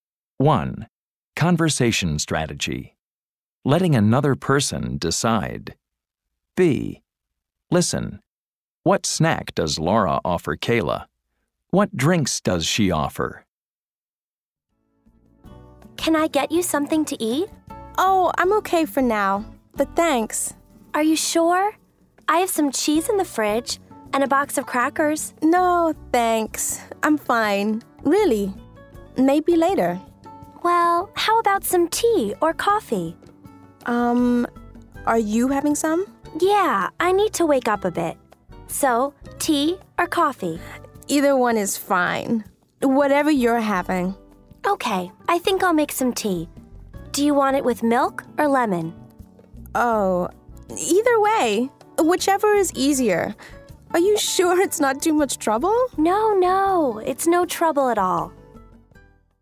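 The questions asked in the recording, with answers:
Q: What snack does Laura offer Kayla?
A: Cheese and crackers

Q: What drinks does she offer?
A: Tea or coffee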